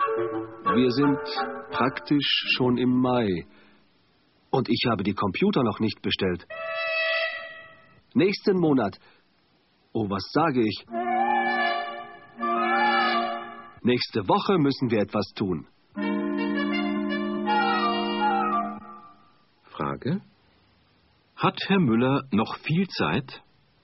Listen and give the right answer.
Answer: Nein, er hat nicht mehr viel Zeit.